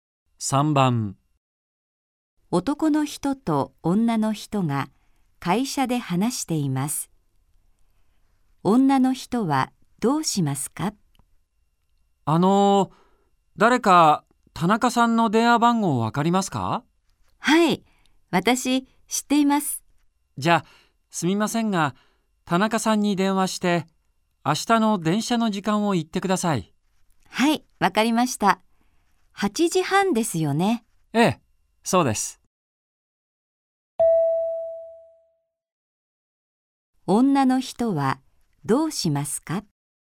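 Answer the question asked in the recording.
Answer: 田中さんに電話して明日の電車の時間(8時半)を言う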